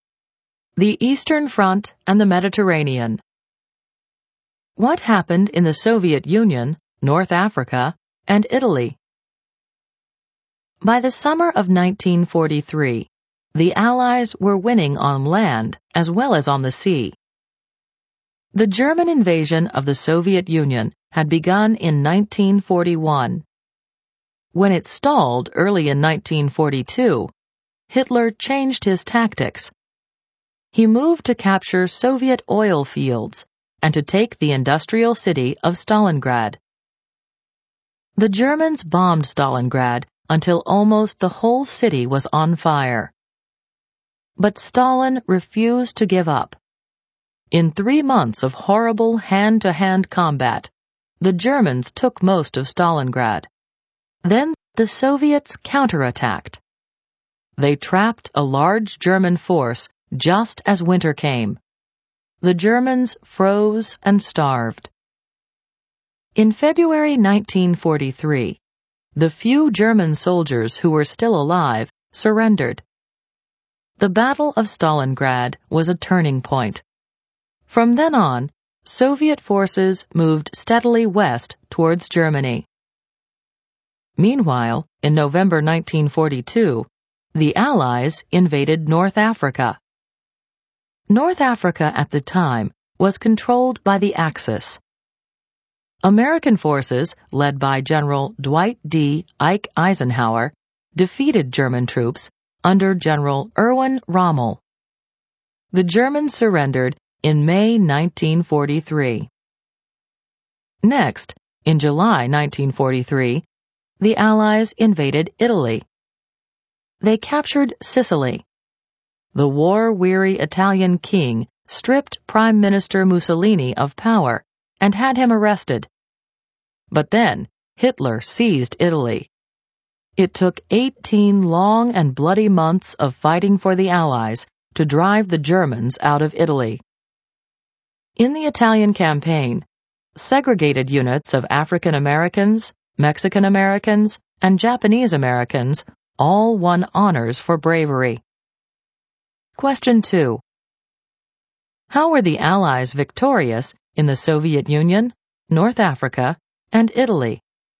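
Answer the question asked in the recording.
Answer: The Soviets counterattacked and trapped the Germans at Stalingrad; Eisenhower's forces defeated Rommel in North Africa; the Allies invaded Sicily and Italy and drove the Germans out after 18 months.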